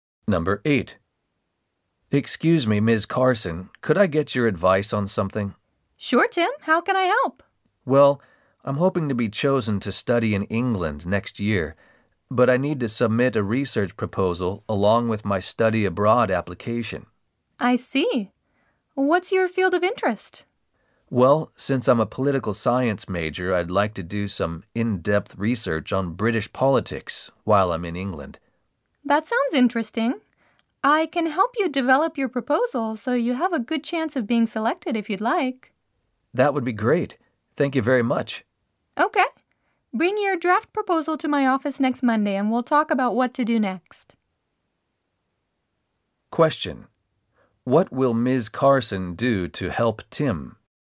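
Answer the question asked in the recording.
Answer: Help him develop his research proposal for studying in England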